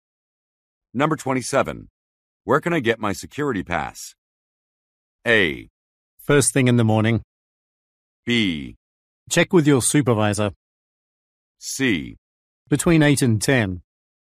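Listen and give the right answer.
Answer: B: Check with your supervisor.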